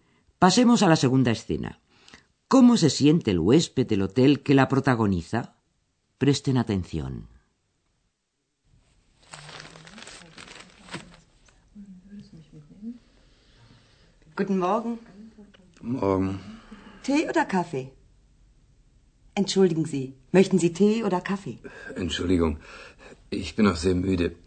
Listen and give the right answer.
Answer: está además tan cansado